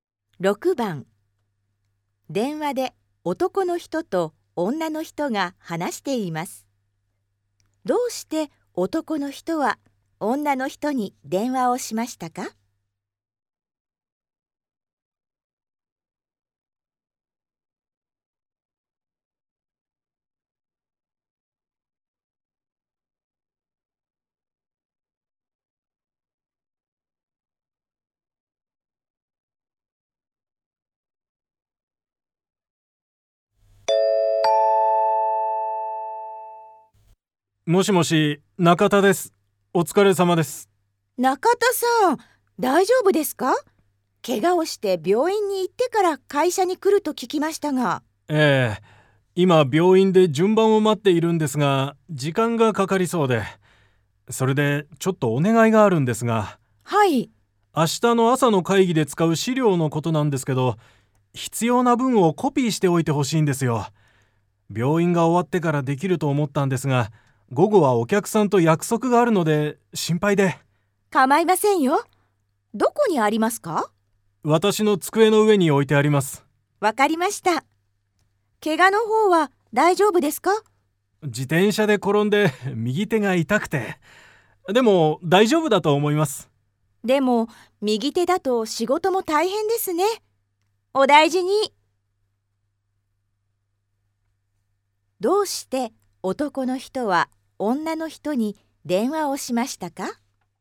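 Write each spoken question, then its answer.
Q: どうして男の人は女の人に電話をしましたか?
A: 会議で使う資料のコピーを頼むため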